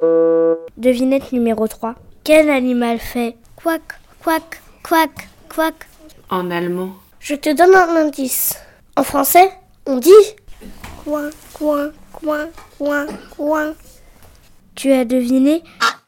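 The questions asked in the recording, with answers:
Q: Quel animal fait ?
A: le canard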